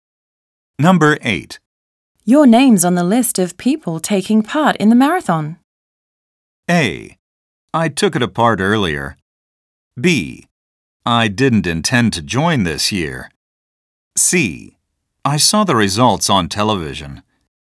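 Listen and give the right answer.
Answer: B: I didn't intend to join this year.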